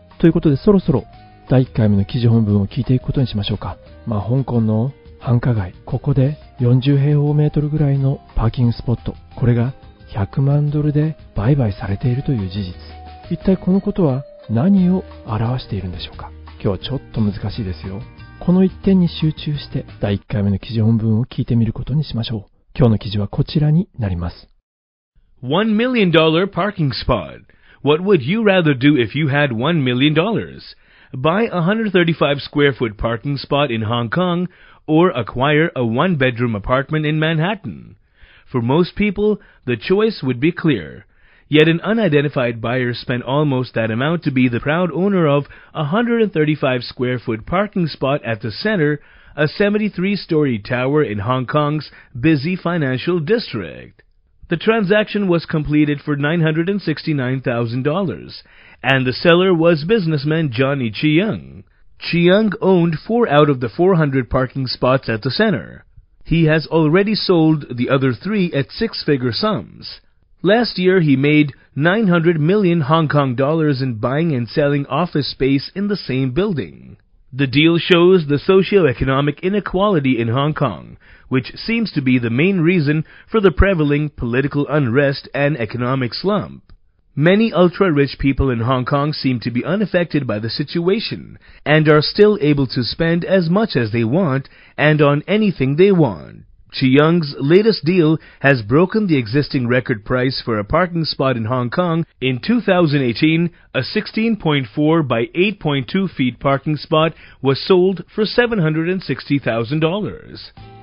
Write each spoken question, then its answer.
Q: まあ、香港の繁華街、ここで40平方メートルぐらいのパーキングスポット、これが100万ドルで売買されているという事実、一体このことは何を表しているんでしょうか。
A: The deal shows the socio-economic inequality in Hong Kong, which seems to be the main reason for the prevailing political unrest and economic slump.